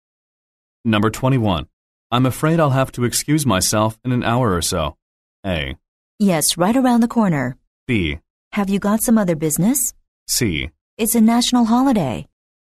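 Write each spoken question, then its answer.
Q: I'm afraid I'll have to excuse myself in an hour or so.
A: B: Have you got some other business?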